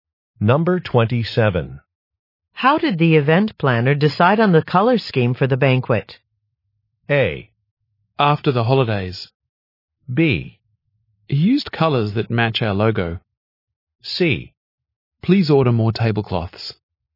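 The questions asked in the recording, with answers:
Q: How did the event planner decide on the color scheme for the banquet?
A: B: He used colors that match our logo.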